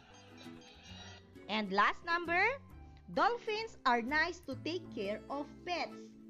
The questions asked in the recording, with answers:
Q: dolphins are nice to take care of pets.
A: Yes, it is an opinion.